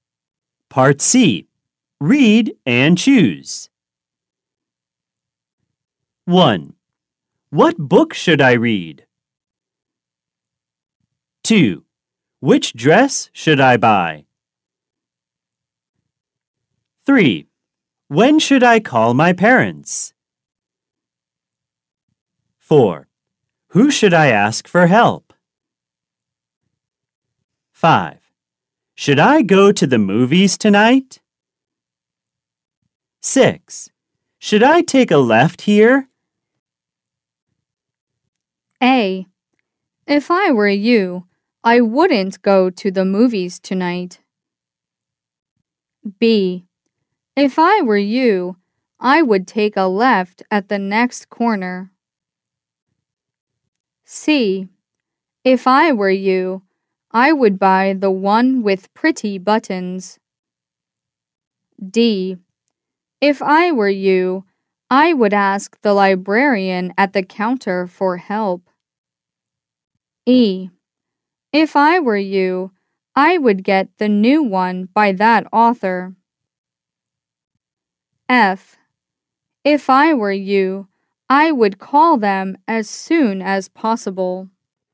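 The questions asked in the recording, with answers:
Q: What book should I read?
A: E: If I were you, I would get the new one by that author.

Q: Which dress should I buy?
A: C: If I were you, I would buy the one with pretty buttons.

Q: When should I call my parents?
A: F: If I were you, I would call them as soon as possible.

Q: Who should I ask for help?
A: D: If I were you, I would ask the librarian at the counter for help.

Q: Should I go to the movies tonight?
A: A: If I were you, I wouldn't go to the movies tonight.

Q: Should I take a left here?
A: B: If I were you, I would take a left at the next corner.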